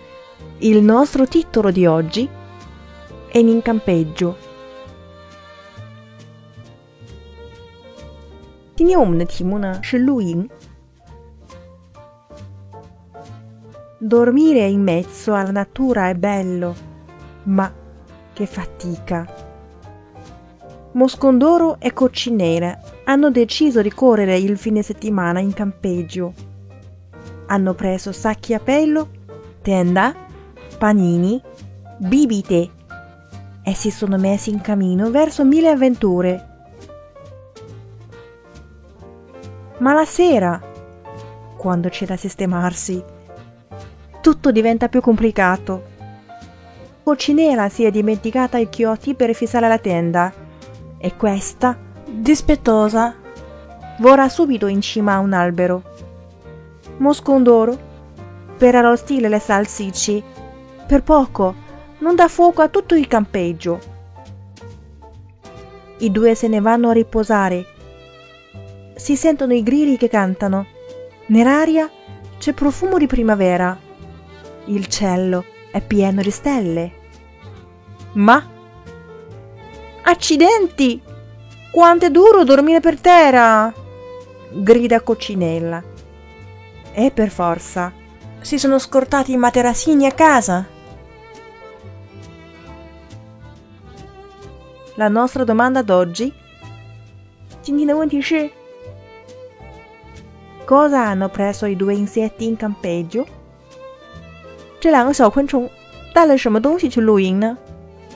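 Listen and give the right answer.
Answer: Sacchi a pelo, tenda, panini e bibite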